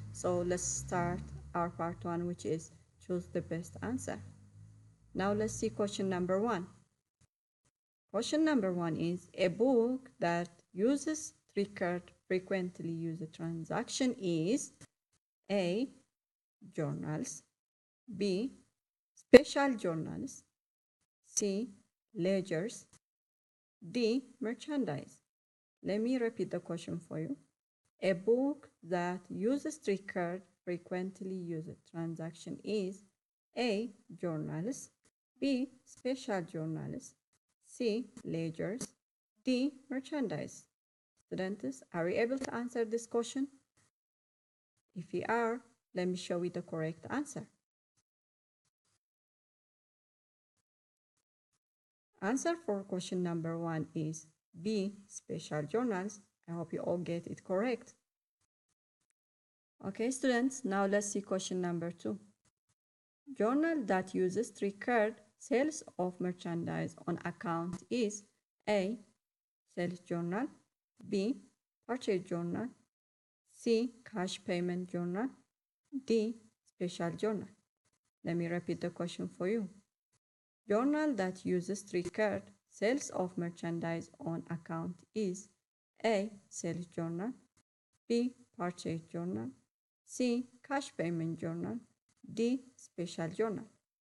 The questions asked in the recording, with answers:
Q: A book that uses three-card frequently used transaction is A, journals, B, special journals, C, ledgers, D, merchandise.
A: Answer for question number one is B, special journals.